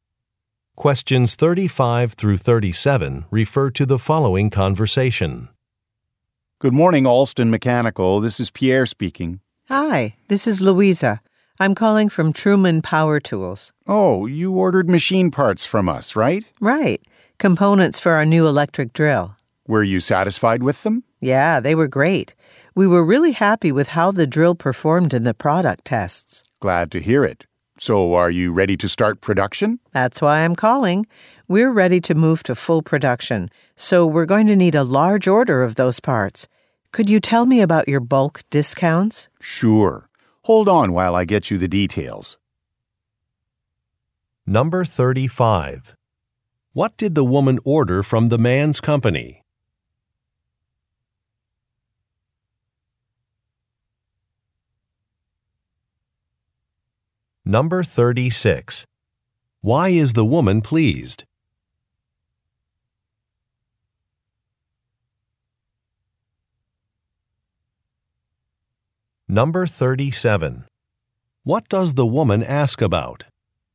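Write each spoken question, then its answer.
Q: What did the woman order from the man's company?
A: Machine parts (components for an electric drill)

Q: Why is the woman pleased?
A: The drill performed well in product tests

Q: What does the woman ask about?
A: Bulk discounts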